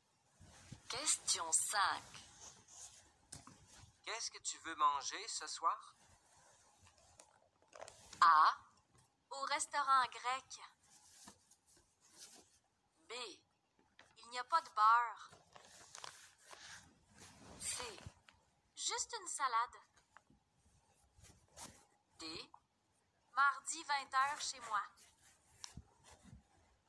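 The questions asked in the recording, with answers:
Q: Qu'est-ce que tu veux manger ce soir?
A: C: Juste une salade.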